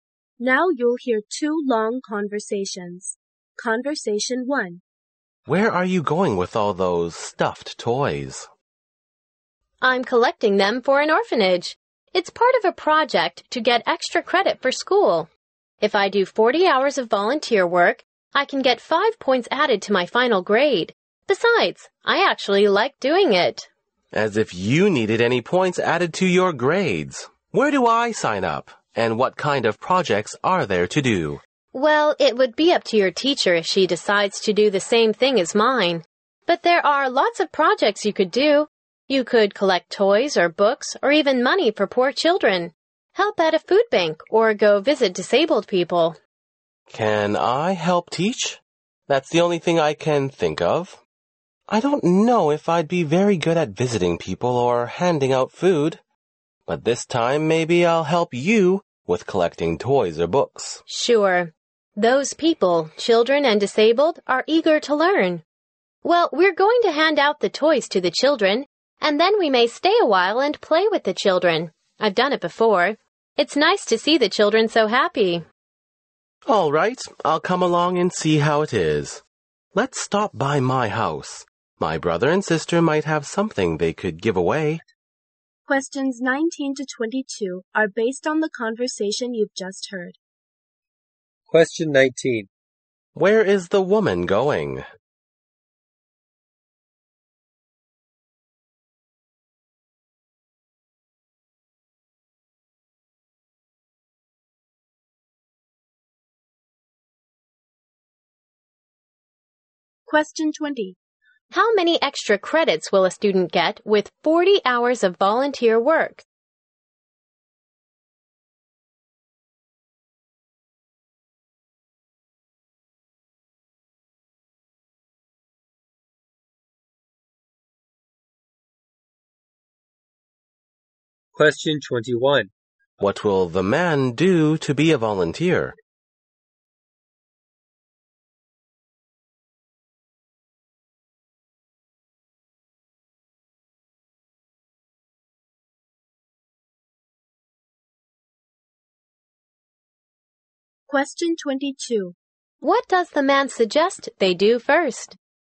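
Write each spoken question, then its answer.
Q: Where is the woman going?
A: To an orphanage.

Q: How many extra credits will a student get with 40 hours of volunteer work?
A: 5 points.

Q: What will the man do to be a volunteer?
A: Help collect toys or books.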